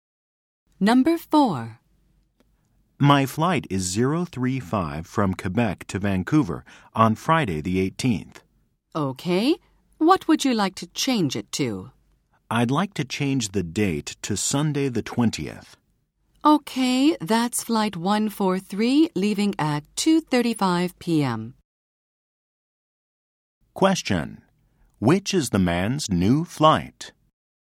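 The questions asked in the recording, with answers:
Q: Which is the man's new flight?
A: Flight 143 on Sunday the 20th, leaving at 2:35 p.m.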